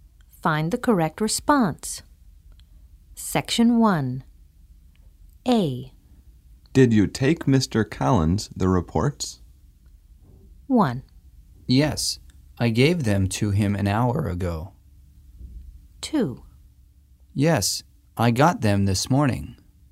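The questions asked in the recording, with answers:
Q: Did you take Mr. Collins the reports?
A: 1: Yes, I gave them to him an hour ago.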